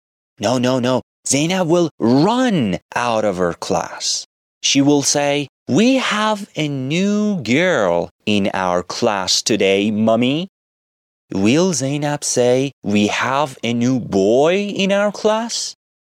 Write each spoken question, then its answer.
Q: Will Zainab say, "We have a new boy in our class?"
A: No. She will say, "We have a new girl in our class."